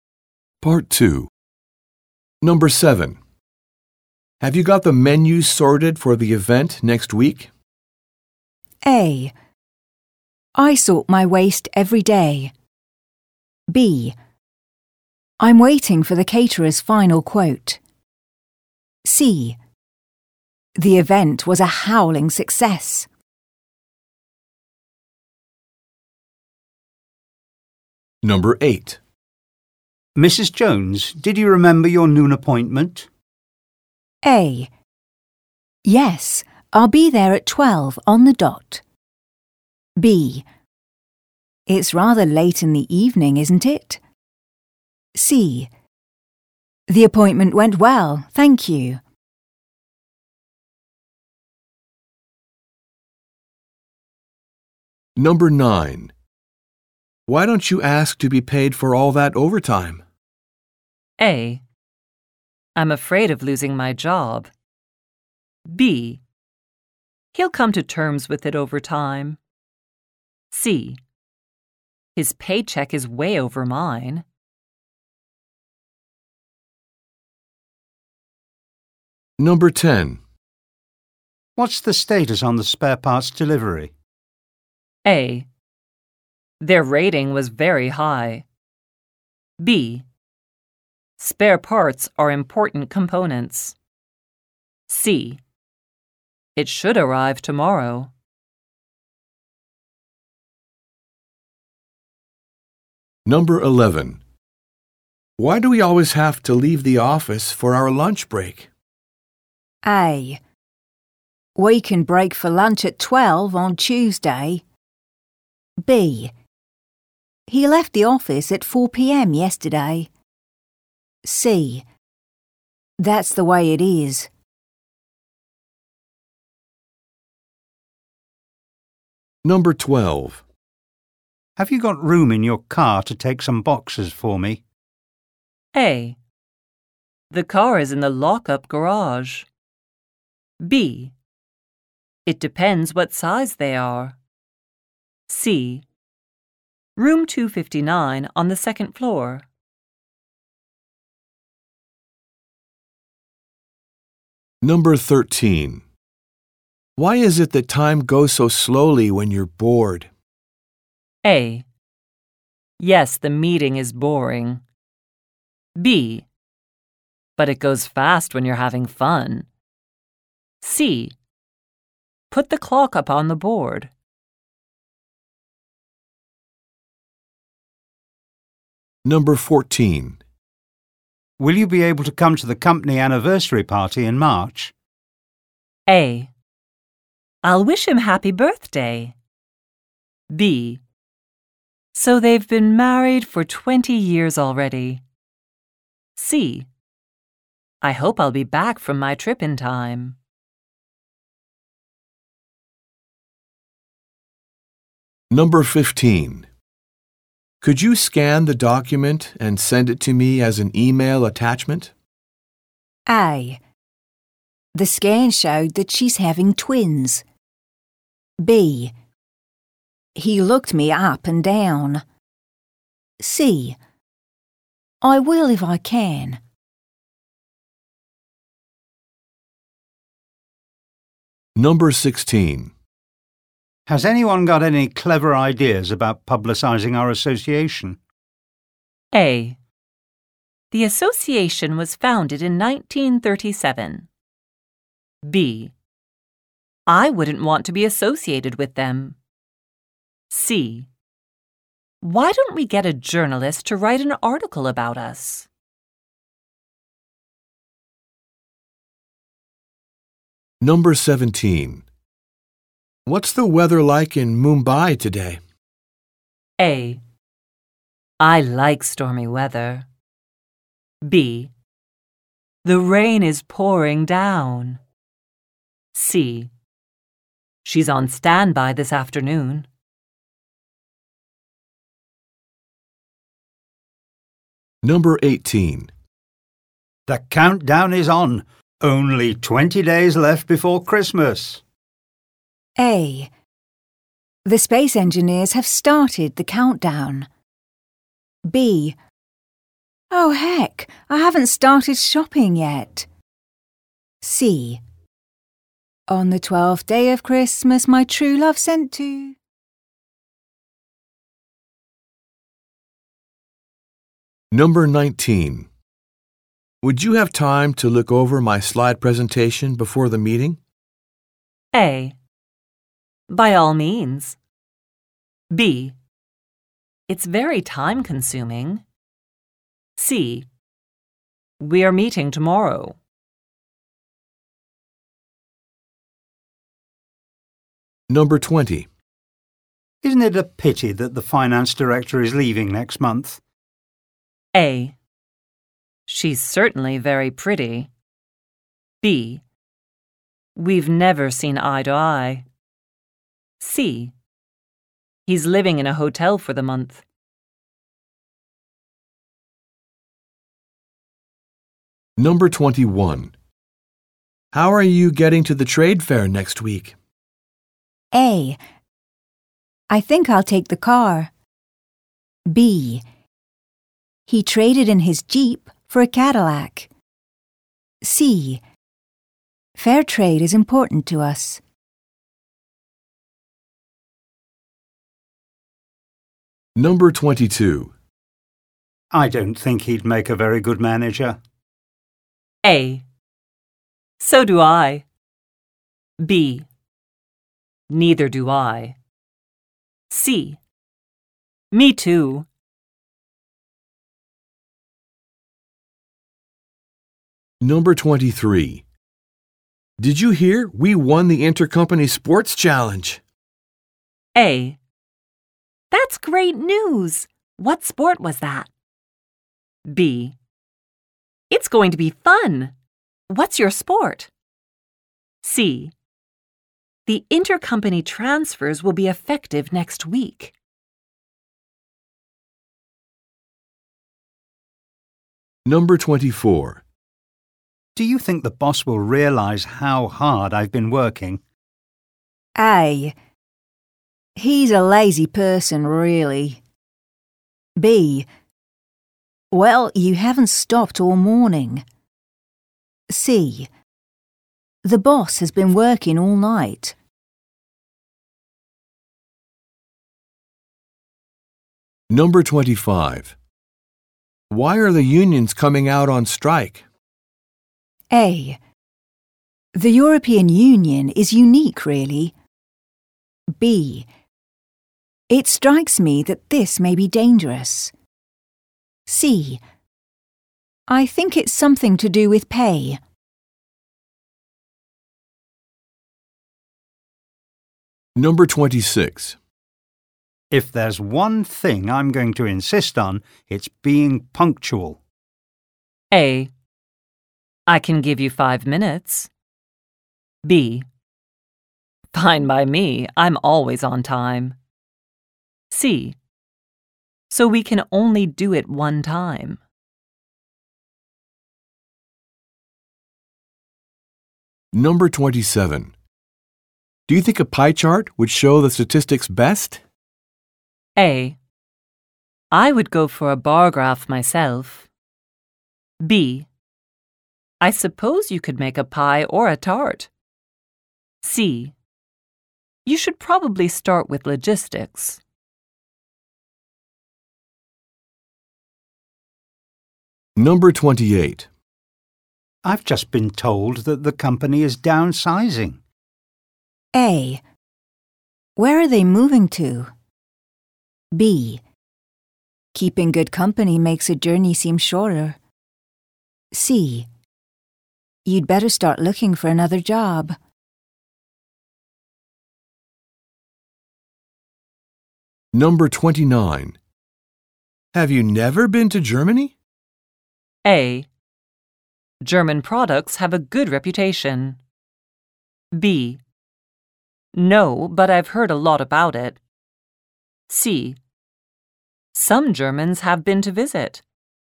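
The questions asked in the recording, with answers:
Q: Have you got the menu sorted for the event next week?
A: B: I'm waiting for the caterer's final quote.

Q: Mrs. Jones, did you remember your noon appointment?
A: A: Yes, I'll be there at 12 on the dot.

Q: Why don't you ask to be paid for all that overtime?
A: A: I'm afraid of losing my job.

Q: What's the status on the spare parts delivery?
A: C: It should arrive tomorrow.

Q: Why do we always have to leave the office for our lunch break?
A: C: That's the way it is.

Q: Have you got room in your car to take some boxes for me?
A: B: It depends what size they are.

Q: Why is it that time goes so slowly when you're bored?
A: B: But it goes fast when you're having fun.

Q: Will you be able to come to the company anniversary party in March?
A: C: I hope I'll be back from my trip in time.

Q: Could you scan the document and send it to me as an email attachment?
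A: C: I will if I can.

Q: Has anyone got any clever ideas about publicizing our association?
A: C: Why don't we get a journalist to write an article about us?

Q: What's the weather like in Mumbai today?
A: B: The rain is pouring down.

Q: The countdown is on. Only 20 days left before Christmas.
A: B: Oh, heck, I haven't started shopping yet.

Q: Would you have time to look over my slide presentation before the meeting?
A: A: By all means.

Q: Isn't it a pity that the finance director is leaving next month?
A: B: We've never seen eye to eye.

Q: How are you getting to the trade fair next week?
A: A: I think I'll take the car.

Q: I don't think he'd make a very good manager.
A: B: Neither do I.

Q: Did you hear we won the intercompany sports challenge?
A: A: That's great news. What sport was that?

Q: Do you think the boss will realize how hard I've been working?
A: B: Well, you haven't stopped all morning.

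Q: Why are the unions coming out on strike?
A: C: I think it's something to do with pay.

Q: If there's one thing I'm going to insist on, it's being punctual.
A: B: Fine by me, I'm always on time.

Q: Do you think a pie chart would show the statistics best?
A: A: I would go for a bar graph myself.

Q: I've just been told that the company is downsizing.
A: C: You'd better start looking for another job.

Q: Have you never been to Germany?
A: B: No, but I've heard a lot about it.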